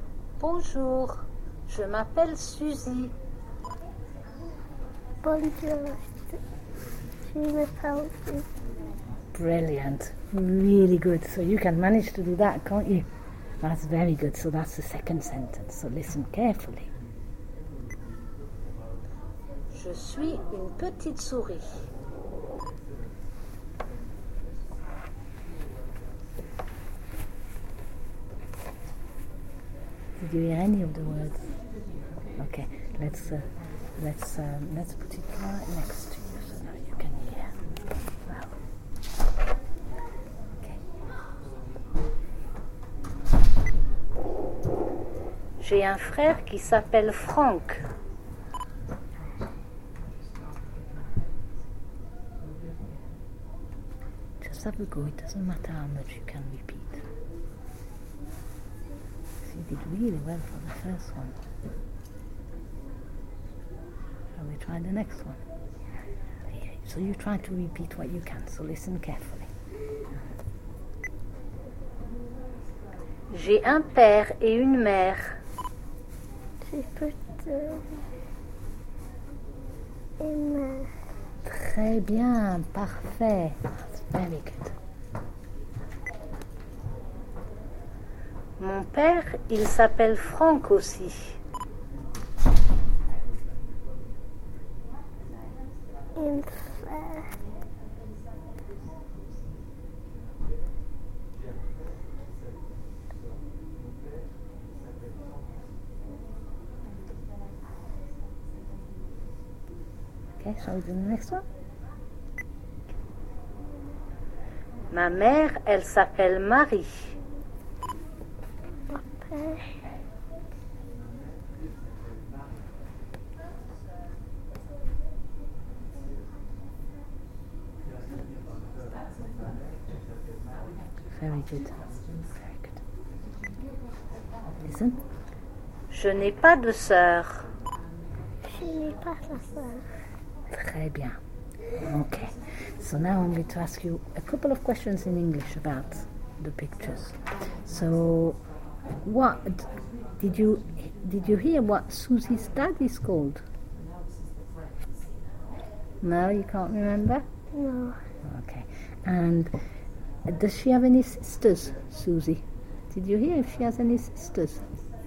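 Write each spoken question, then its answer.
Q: So what did you hear what Susie's dad is called?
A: Franck

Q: Did you hear if she has any sisters?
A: No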